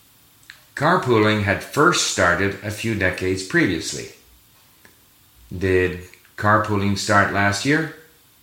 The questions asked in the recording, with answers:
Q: Did carpooling start last year?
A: No. Carpooling had first started a few decades previously.